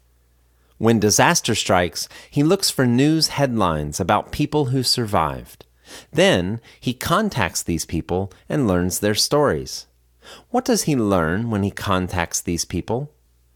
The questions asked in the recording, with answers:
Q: What does he learn when he contacts these people?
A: He learns their stories.